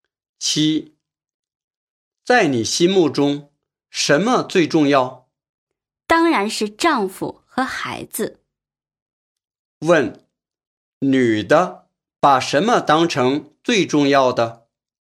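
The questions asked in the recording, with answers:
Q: 问,女的把什么当成最重要的?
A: 丈夫和孩子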